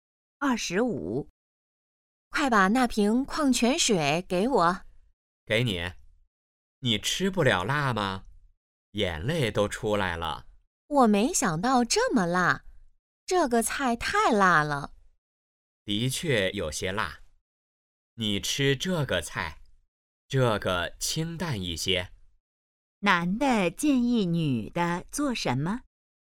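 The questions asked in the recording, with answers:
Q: 男的建议女的做什么?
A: 吃清淡一些的菜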